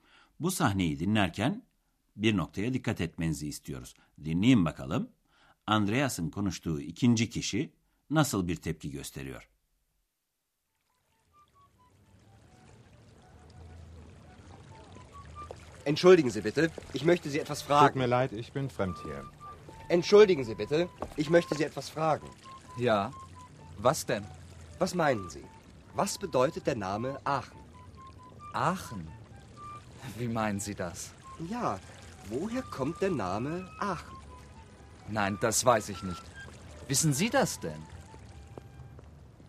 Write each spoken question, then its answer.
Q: Dinleyin bakalım. Andreas'ın konuştuğu ikinci kişi nasıl bir tepki gösteriyor?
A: Andreas'ın soru sorduğu ikinci kişi Aachen kentinin adının nereden geldiğini bilmiyordu.